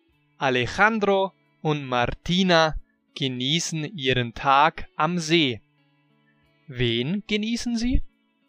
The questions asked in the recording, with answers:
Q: Wen genießen sie?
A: Ihren Tag am See. Sie genießen ihren Tag am See.